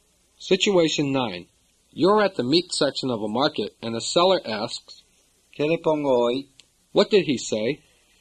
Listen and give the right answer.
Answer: He said, what can I do for you today?